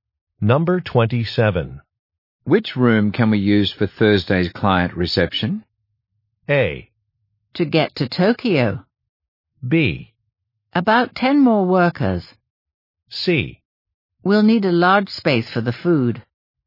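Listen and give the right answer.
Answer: C: We'll need a large space for the food.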